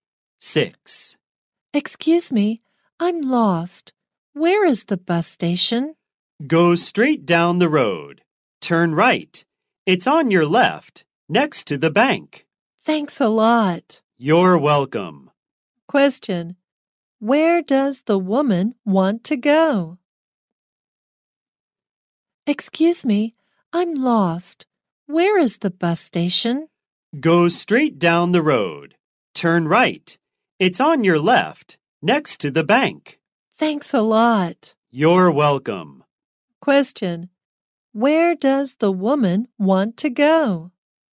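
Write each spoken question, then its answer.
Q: Question: Where does the woman want to go?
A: The bus station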